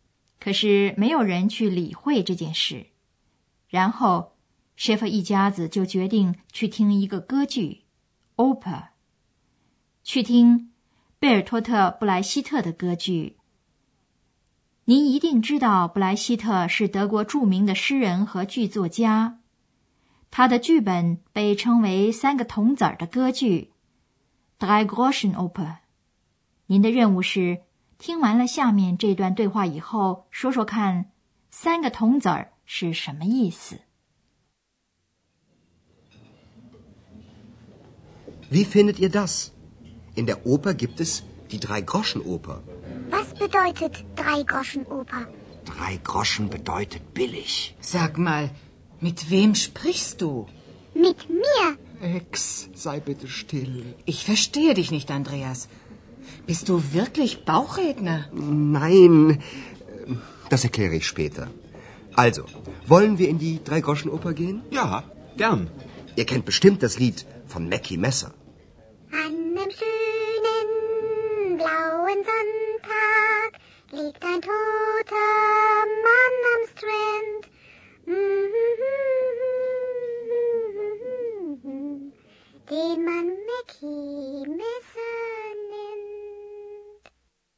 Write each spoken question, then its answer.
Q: 您的任务是听完了下面这段对话以后,说说看三个铜子儿是什么意思。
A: 您听出来了吗?三个铜子儿是便宜的意思。